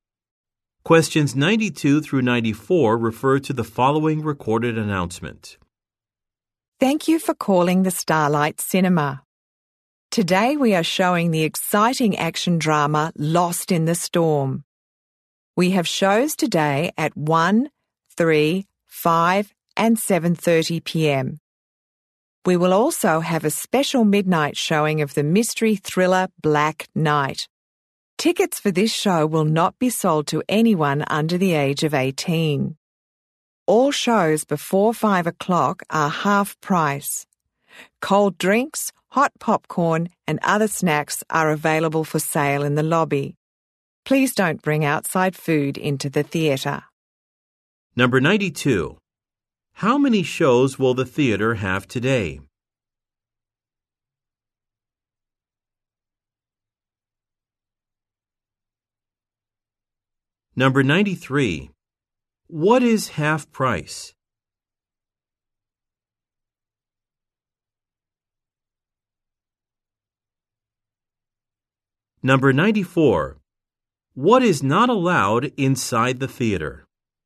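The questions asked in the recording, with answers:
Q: How many shows will the theatre have today?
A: Five

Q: What is half price?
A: Shows before 5 o'clock

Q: What is not allowed inside the theater?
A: Outside food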